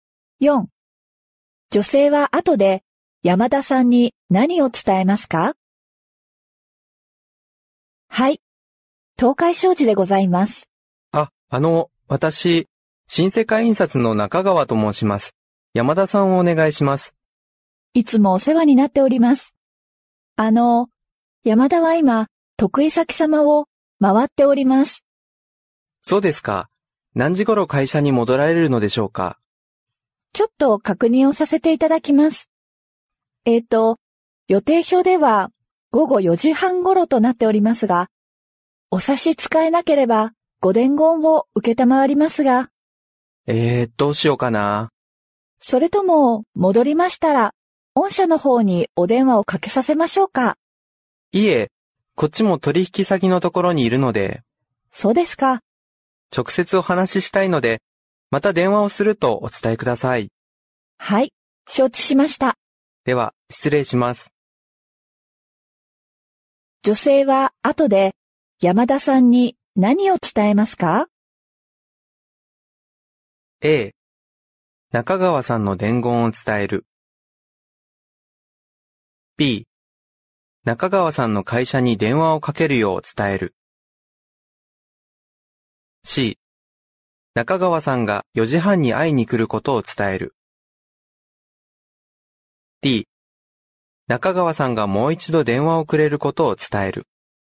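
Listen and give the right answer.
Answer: D: 中川さんがもう一度電話をくれることを伝える。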